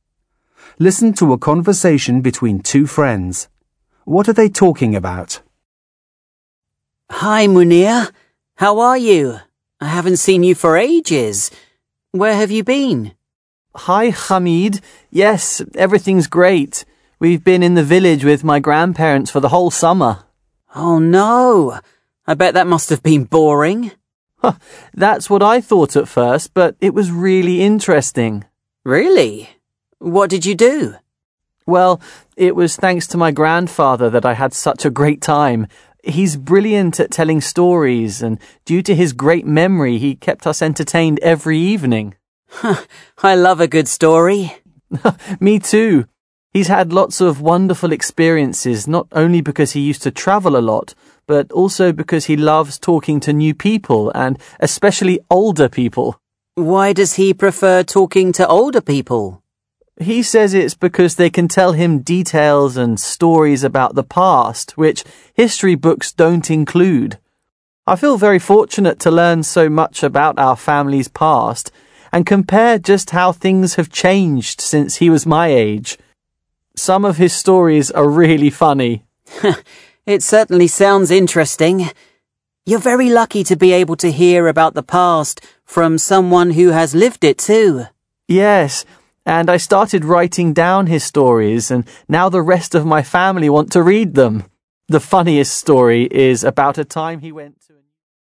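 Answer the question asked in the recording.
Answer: Munir's summer in the village with his grandparents and his grandfather's stories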